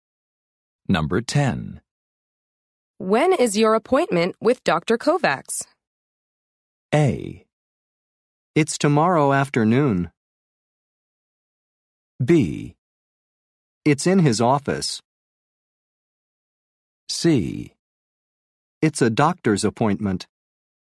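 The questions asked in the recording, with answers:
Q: When is your appointment with Dr. Kovacs?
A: A: It's tomorrow afternoon.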